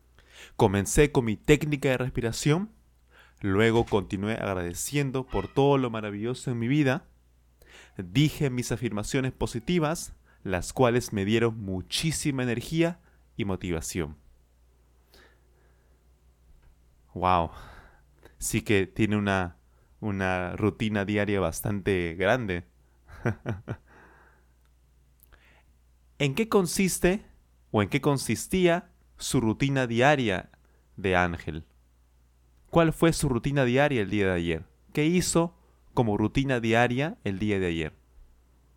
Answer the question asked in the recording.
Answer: Por supuesto, sí. Comenzó con su técnica de respiración.